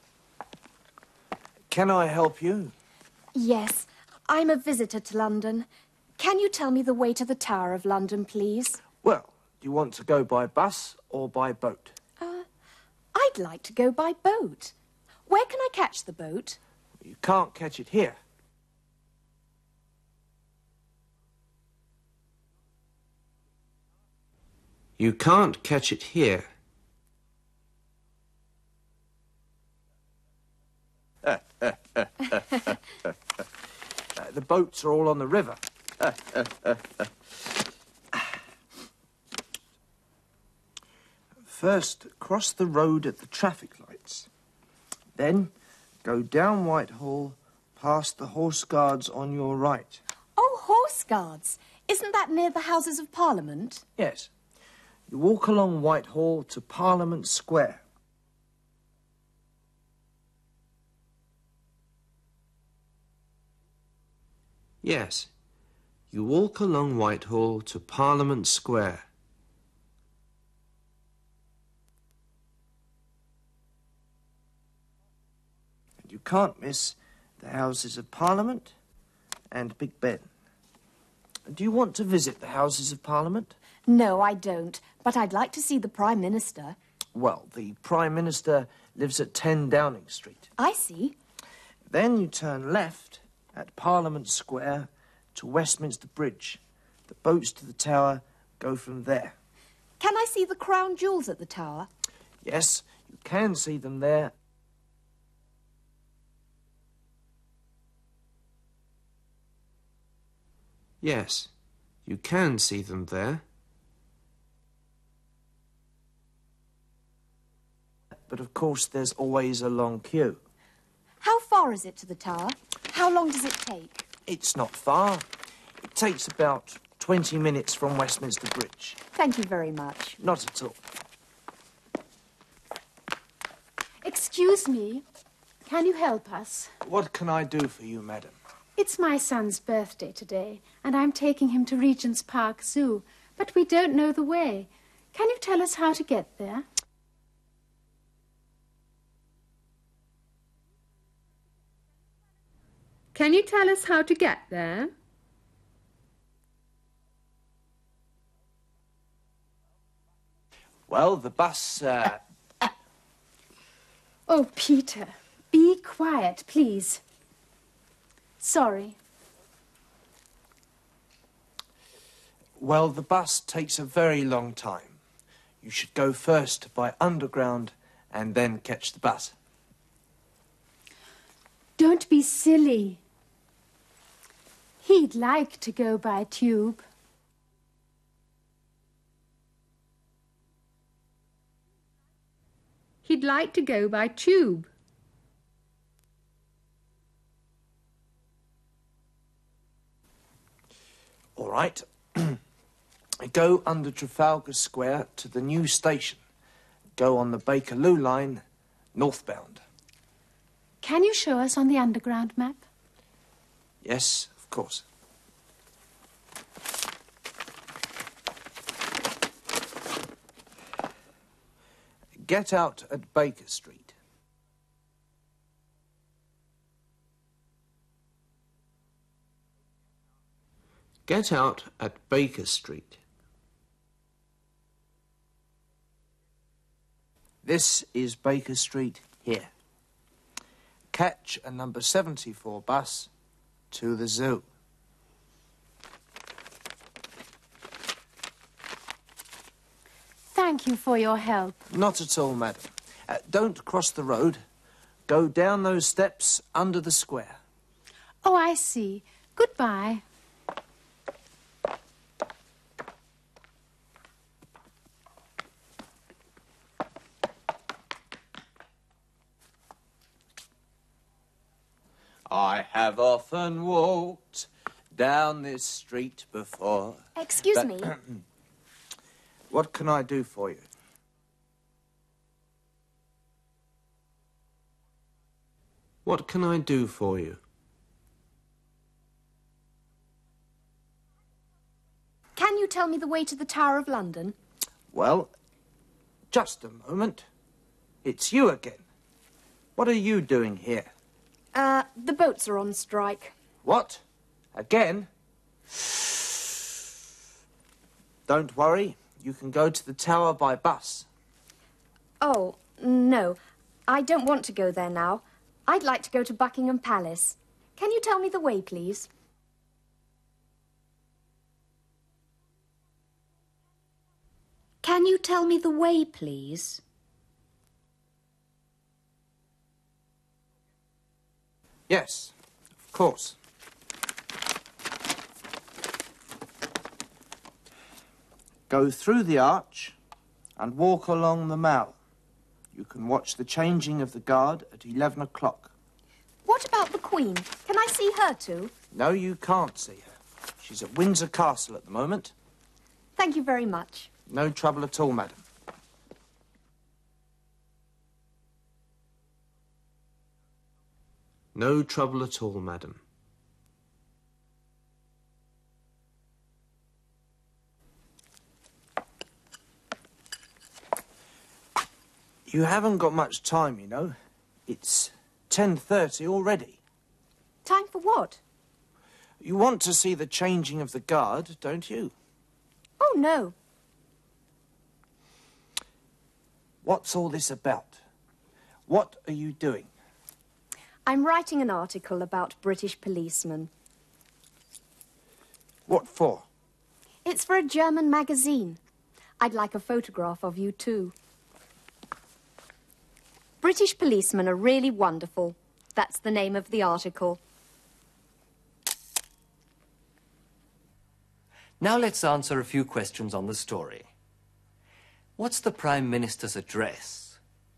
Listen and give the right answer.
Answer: It's 10 Downing Street.